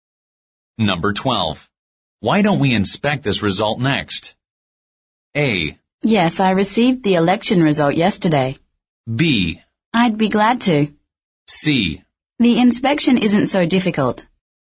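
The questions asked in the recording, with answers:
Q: Why don't we inspect this result next?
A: B: I'd be glad to.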